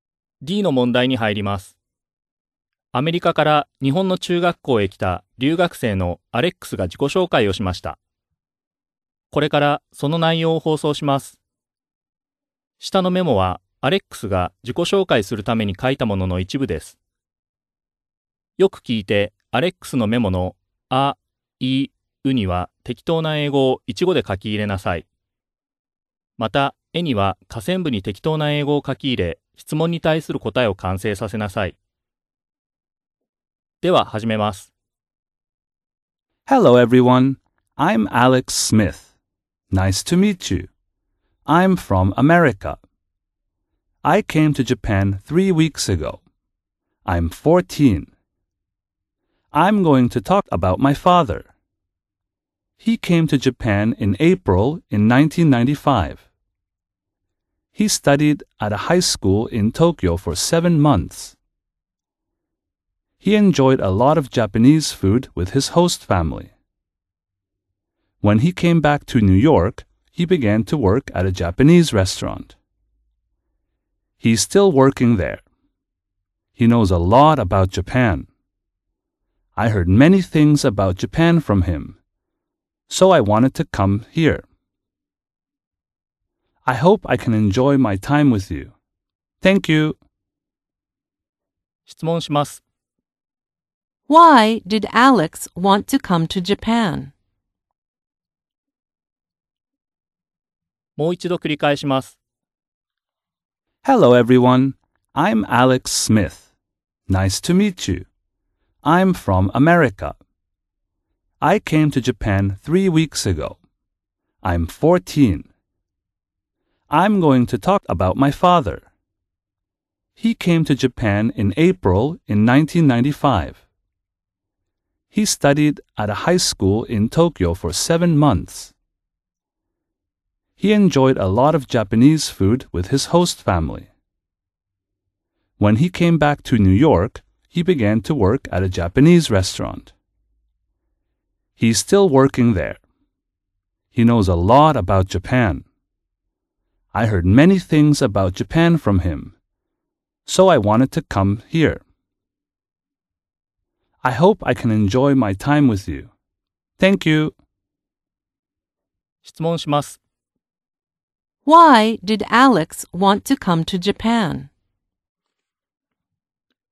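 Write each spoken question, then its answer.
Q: Why did Alex want to come to Japan?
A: Because he heard many things about Japan from his father.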